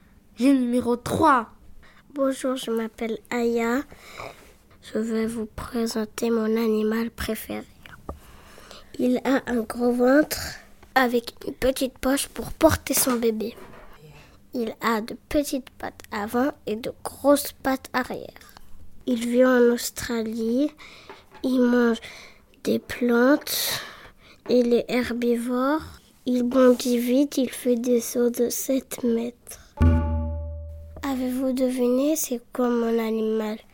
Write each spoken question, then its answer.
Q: Avez-vous deviné c'est quoi mon animal?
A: C'est le kangourou.